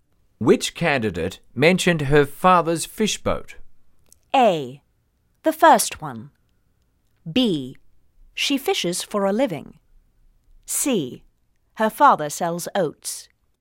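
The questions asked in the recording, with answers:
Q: Which candidate mentioned her father's fish boat?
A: A: The first one.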